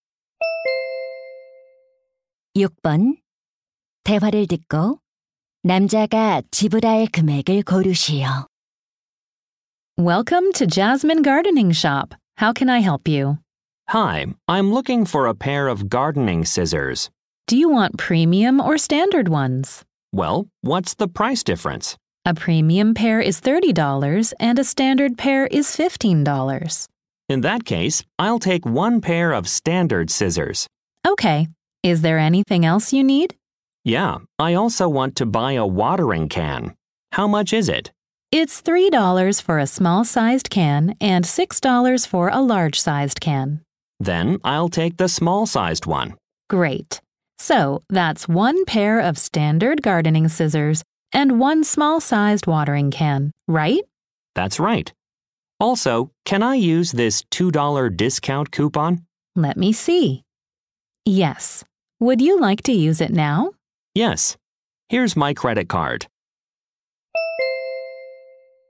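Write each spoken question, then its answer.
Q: 대화를 듣고 남자가 지불할 금액을 고르시오.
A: $16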